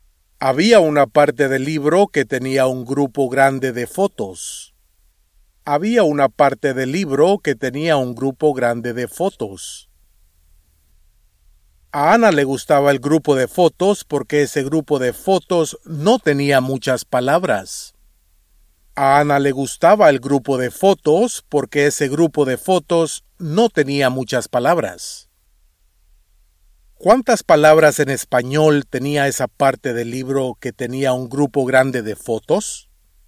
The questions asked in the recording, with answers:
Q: ¿Cuántas palabras en español tenía esa parte del libro que tenía un grupo grande de fotos?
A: Esa parte del libro no tenía muchas palabras en español.